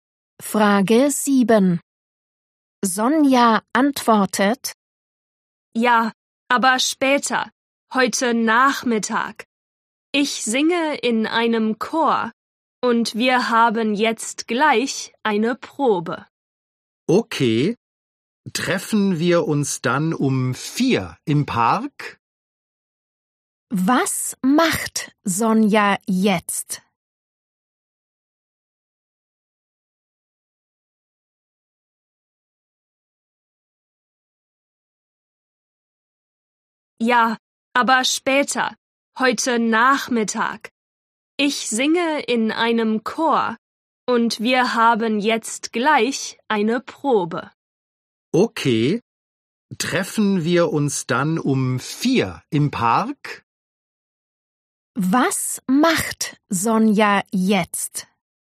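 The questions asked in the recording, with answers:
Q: Was macht Sonja jetzt?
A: Sie geht zur Chorprobe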